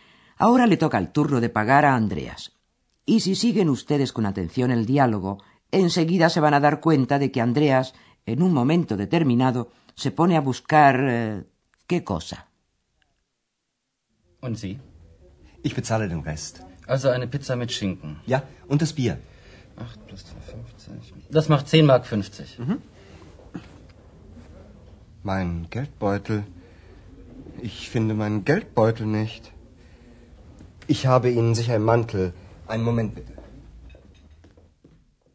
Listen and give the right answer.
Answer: Y este último Andreas no lo encuentra.